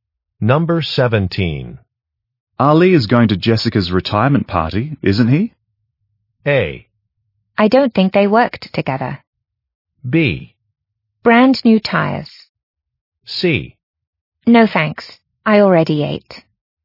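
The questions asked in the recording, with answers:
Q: Ali is going to Jessica's retirement party, isn't he?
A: A: I don't think they worked together.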